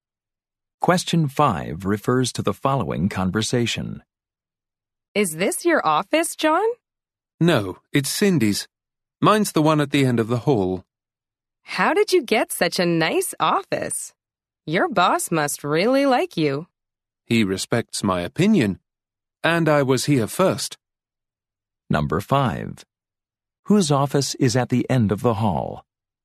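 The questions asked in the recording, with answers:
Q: Whose office is at the end of the hall?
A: John's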